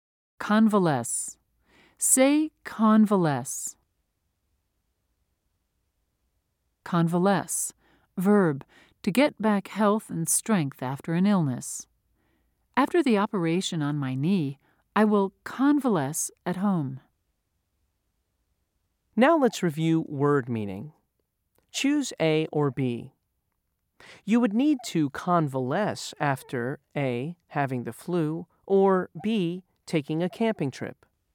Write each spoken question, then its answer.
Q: Choose A or B. You would need to convalesce after A, having the flu, or B, taking a camping trip.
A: If you said A, you were correct.